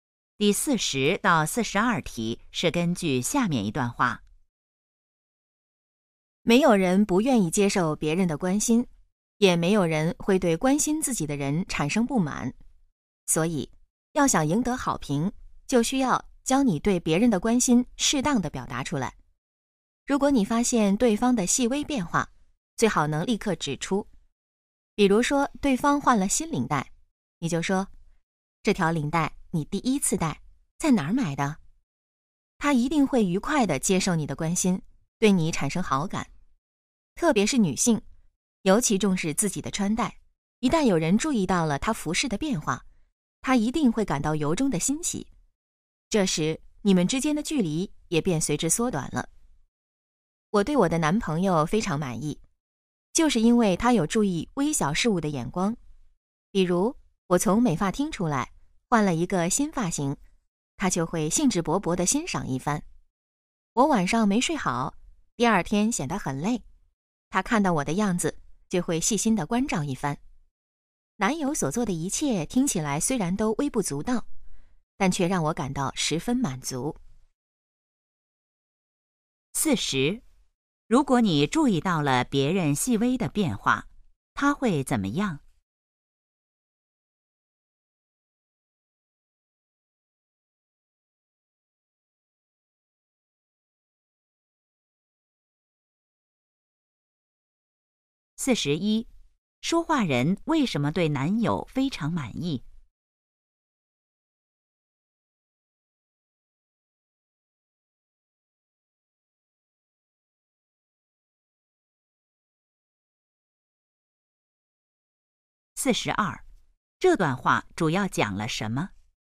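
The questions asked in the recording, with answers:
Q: 如果你注意到了别人细微的变化,他会怎么样?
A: 愉快地接受你的关心,对你产生好感

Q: 说话人为什么对男友非常满意?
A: 他能注意到微小的事物

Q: 这段话主要讲了什么?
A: 要适当表达对别人的关心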